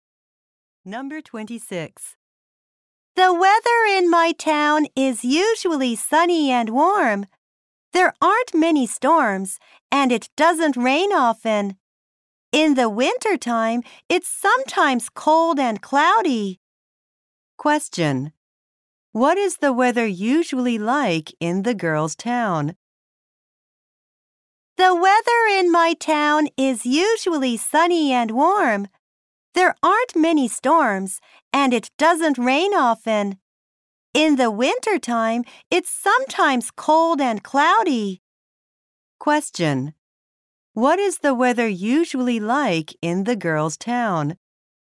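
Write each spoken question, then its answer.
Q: What is the weather usually like in the girl's town?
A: Sunny and warm.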